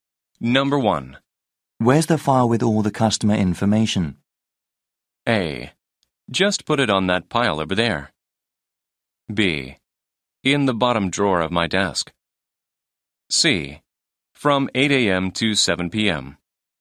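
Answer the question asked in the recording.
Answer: B: In the bottom drawer of my desk.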